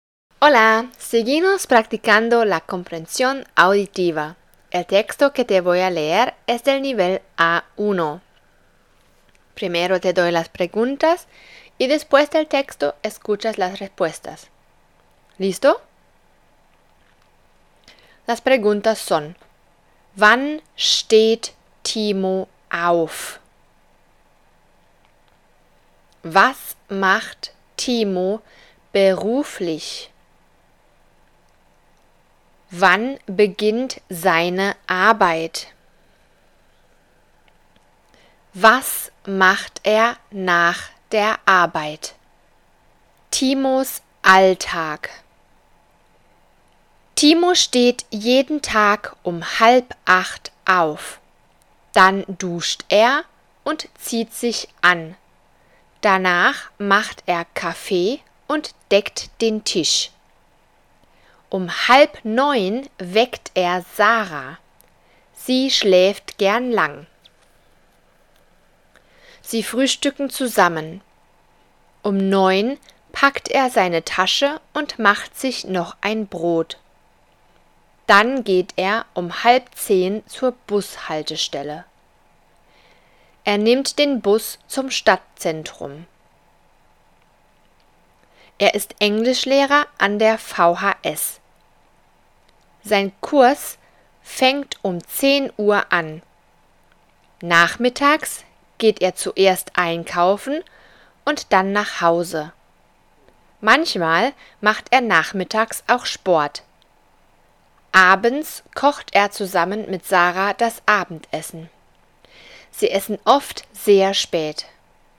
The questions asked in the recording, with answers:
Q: ¿Wann steht Timo auf?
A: Um halb acht.

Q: Was macht Timo beruflich?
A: Er ist Englischlehrer.

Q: Wann beginnt seine Arbeit?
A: Um 10 Uhr.

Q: Was macht er nach der Arbeit?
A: Er geht einkaufen. Manchmal macht er Sport.